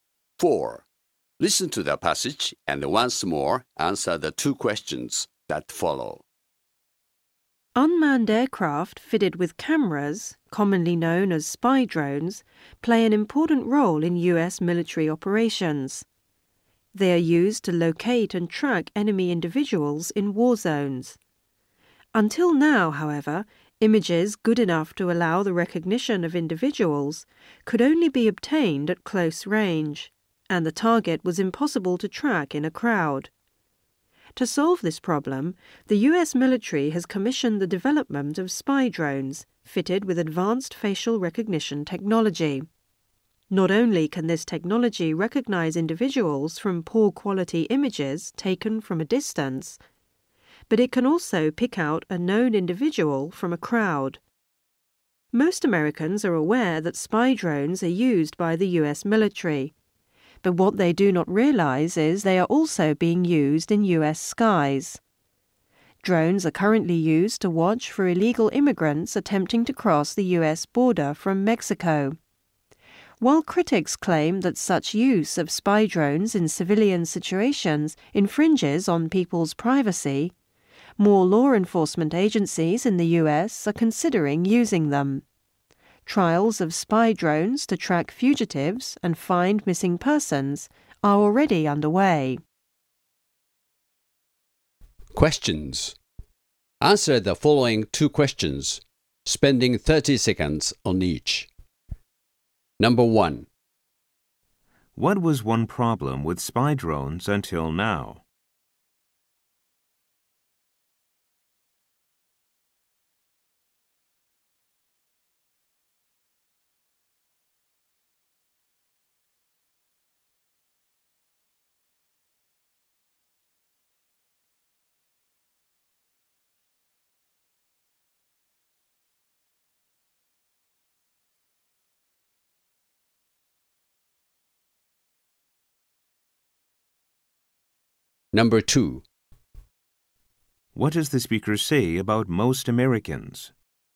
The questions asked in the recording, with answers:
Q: What was one problem with spy drones until now?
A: Until now, the technology in spy drones was inadequate for tracking individuals in crowds.

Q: What does the speaker say about most Americans?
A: The speaker says that while most Americans are aware of the use of drones in military roles abroad, many Americans are unaware of drones in service over U.S.